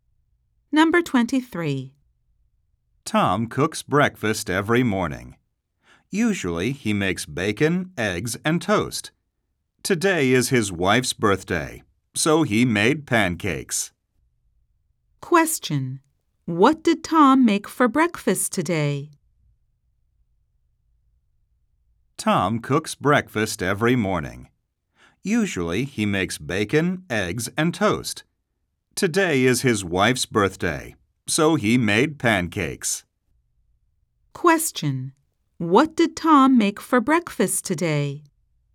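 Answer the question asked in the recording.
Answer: Pancakes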